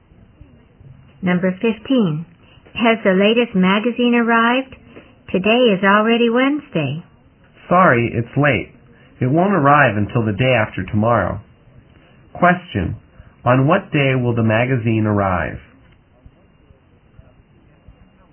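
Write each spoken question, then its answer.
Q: Question, on what day will the magazine arrive?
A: Friday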